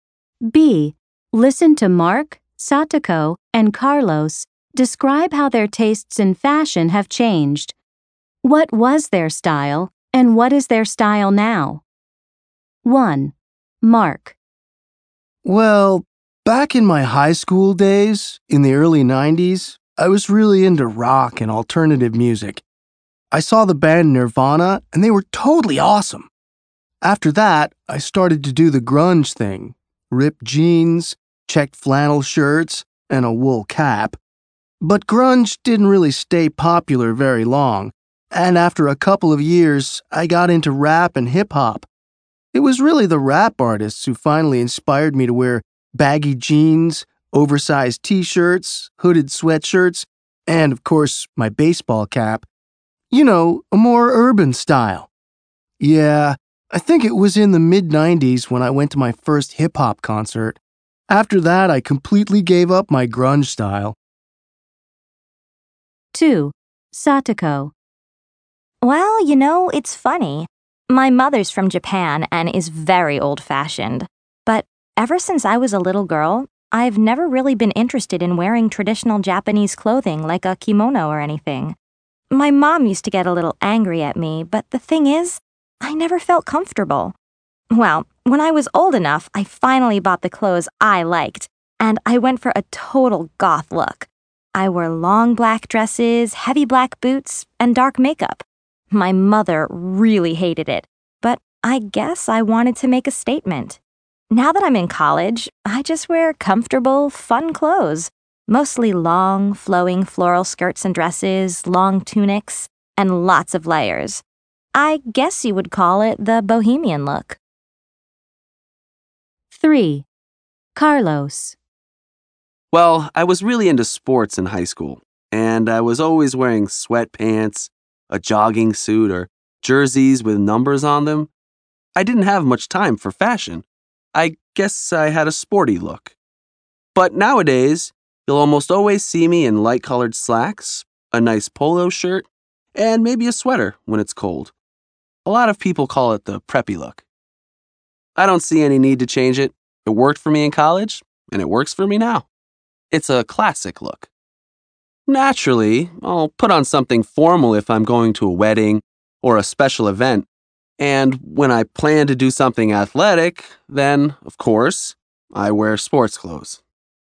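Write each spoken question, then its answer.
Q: What was their style, and what is their style now?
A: Mark: was grunge, now urban (hip-hop) style

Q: What was their style, and what is their style now?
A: Satoko: was goth, now bohemian look

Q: What was their style, and what is their style now?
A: Carlos: was sporty, now preppy look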